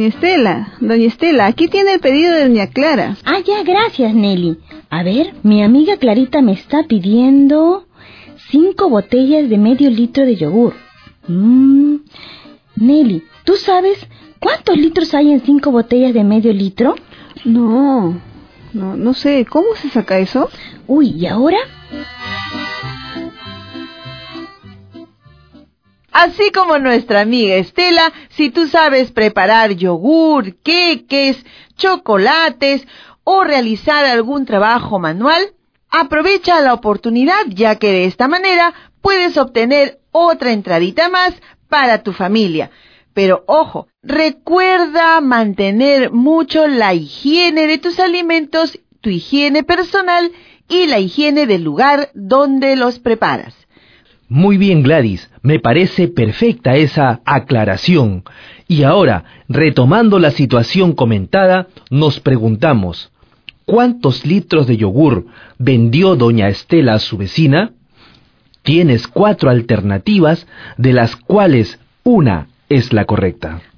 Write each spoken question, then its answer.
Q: ¿cuántos litros de yogur vendió doña Estela a su vecina?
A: 2 enteros, 1 medio.